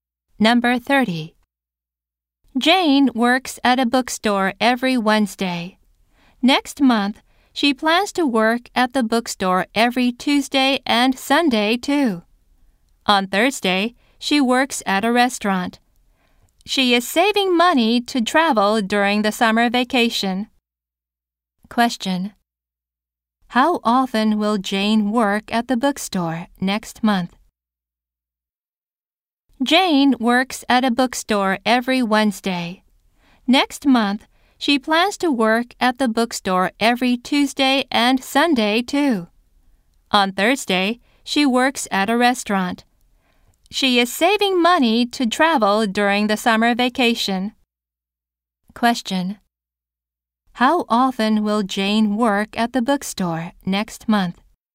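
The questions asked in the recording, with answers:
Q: How often will Jane work at the bookstore next month?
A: Three times a week.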